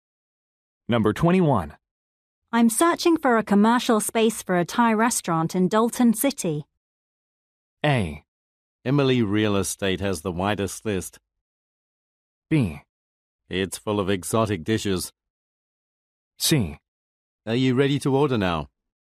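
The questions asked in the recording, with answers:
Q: I'm searching for a commercial space for a Thai restaurant in Dalton City.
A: A: Emily Real Estate has the widest list.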